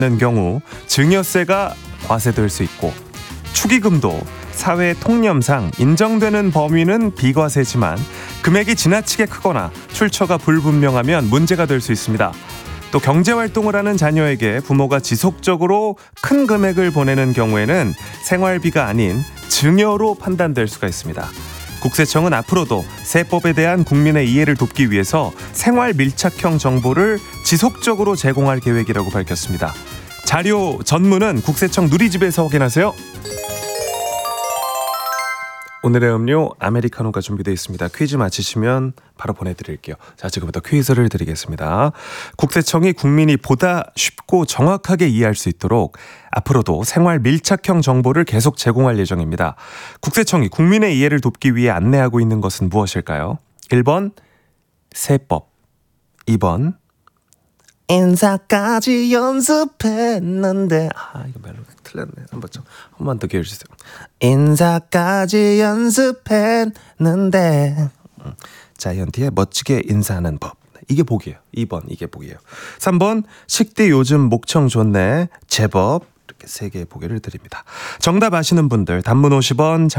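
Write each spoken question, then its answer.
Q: 국세청이 국민의 이해를 돕기 위해 안내하고 있는 것은 무엇일까요?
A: 1번: 세법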